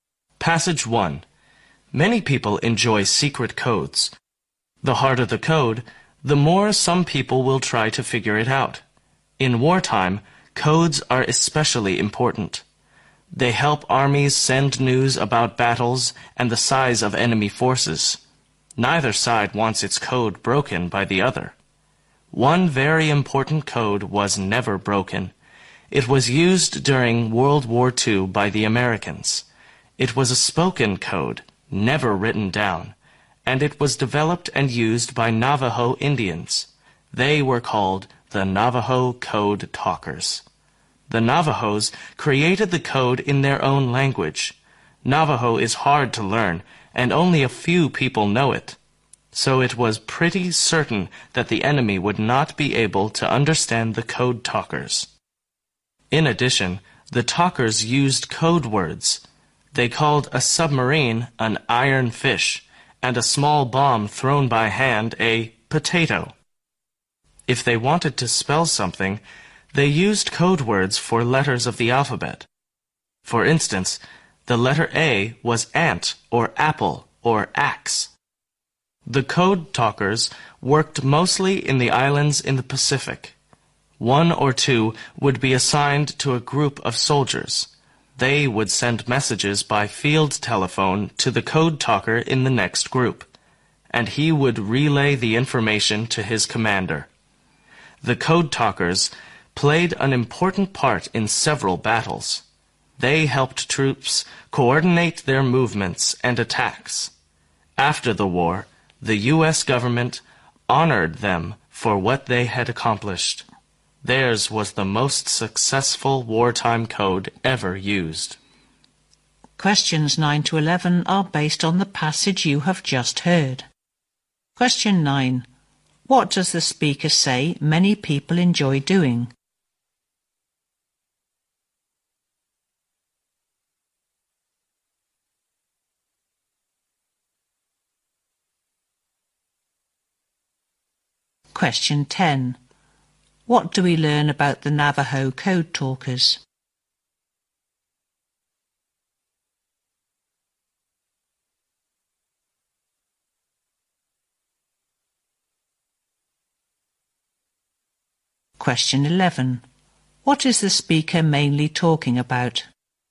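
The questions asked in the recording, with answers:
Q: What does the speaker say many people enjoy doing?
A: Figuring out secret codes

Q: What is the speaker mainly talking about?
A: The Navajo code used in World War II, the most successful wartime code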